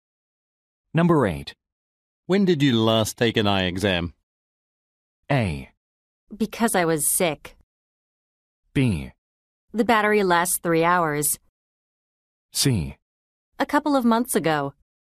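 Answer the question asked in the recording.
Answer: C: A couple of months ago.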